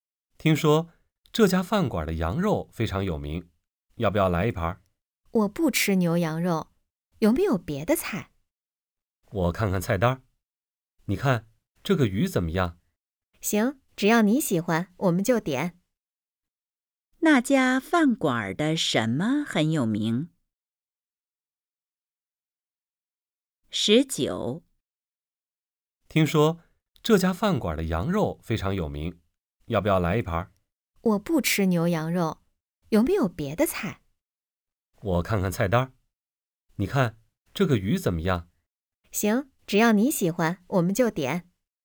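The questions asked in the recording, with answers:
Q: 那家饭馆的什么很有名?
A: 羊肉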